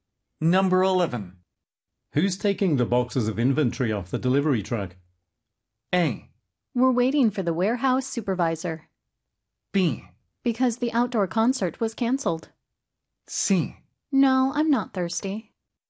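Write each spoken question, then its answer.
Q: Who's taking the boxes of inventory off the delivery truck?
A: A: We're waiting for the warehouse supervisor.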